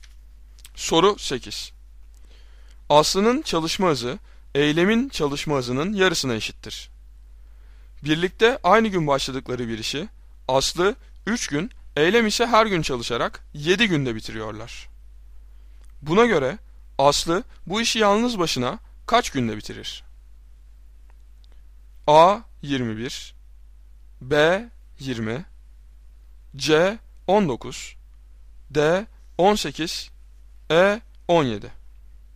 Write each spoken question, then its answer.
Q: Buna göre Aslı bu işi yalnız başına kaç günde bitirir?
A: Doğru cevap E 17.